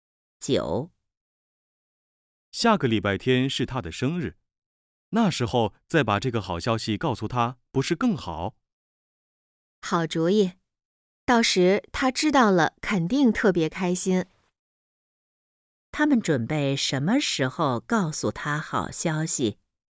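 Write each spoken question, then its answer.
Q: 他们准备什么时候告诉他好消息?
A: 下个礼拜天她的生日那天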